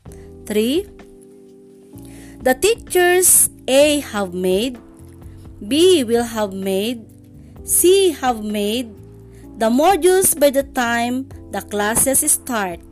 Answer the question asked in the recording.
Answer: Very good. It's letter B, will have made.